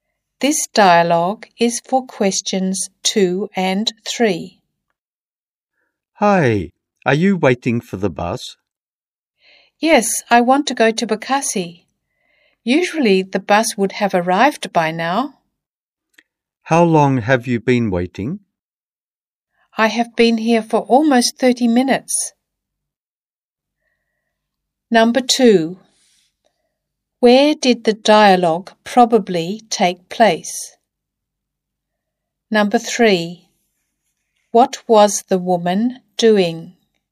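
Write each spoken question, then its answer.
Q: Where did the dialogue probably take place?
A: At a bus stop

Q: What was the woman doing?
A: Waiting for the bus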